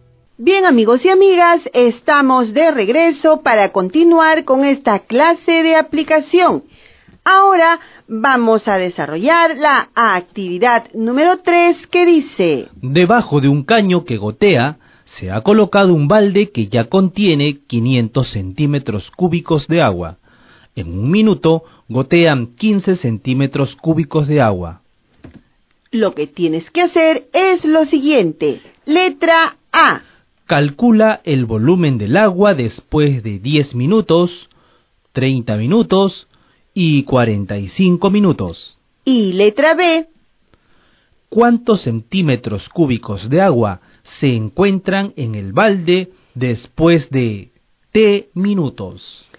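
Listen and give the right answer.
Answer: 500 + 15T centímetros cúbicos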